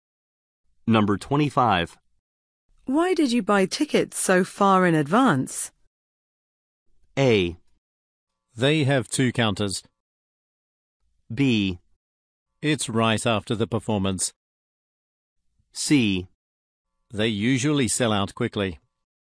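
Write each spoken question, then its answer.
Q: Why did you buy tickets so far in advance?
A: C: They usually sell out quickly.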